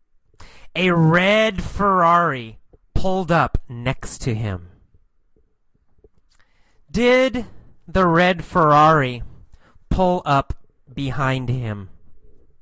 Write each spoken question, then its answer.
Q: Did the red Ferrari pull up behind him?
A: No, not behind him. The red Ferrari pulled up next to him.